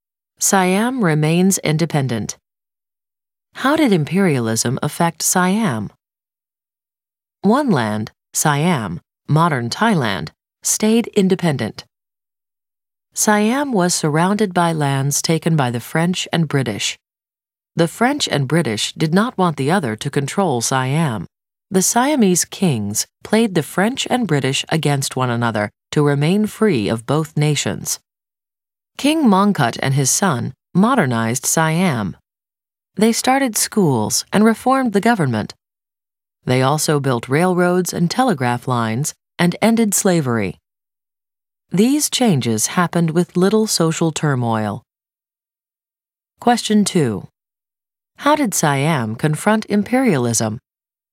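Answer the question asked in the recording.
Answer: Its kings played the French and British against each other and modernized the country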